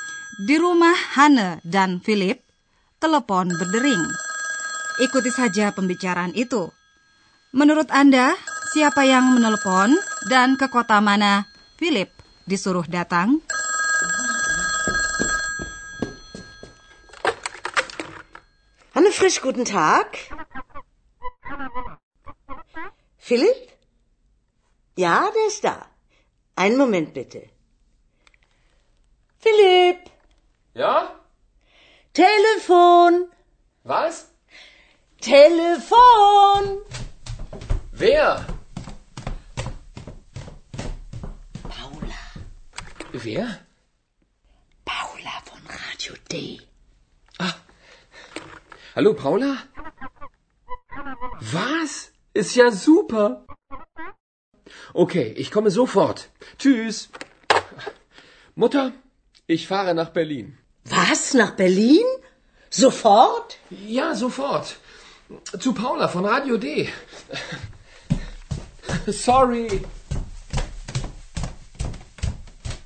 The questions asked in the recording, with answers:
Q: Menurut Anda, siapa yang menelepon dan ke kota mana Philip disuruh datang?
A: Yang menelpon tadi seorang perempuan bernama Paula Rupanya bekerja di sebuah stasiun radio, Radio D, dan Philip disuruh datang ke Berlin.